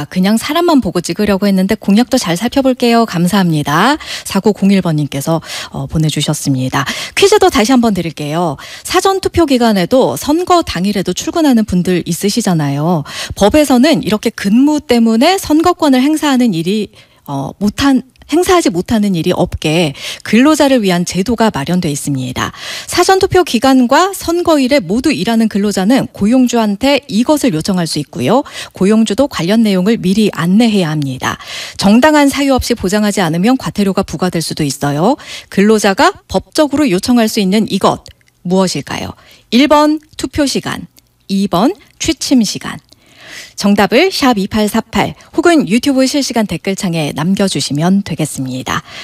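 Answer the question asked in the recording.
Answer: 1번: 투표 시간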